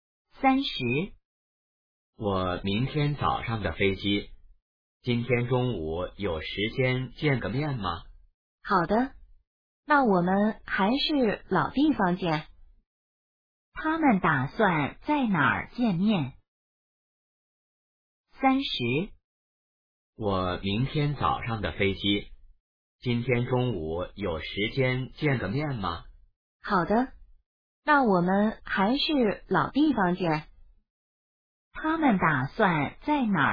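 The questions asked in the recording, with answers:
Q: 他们打算在哪儿见面?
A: 老地方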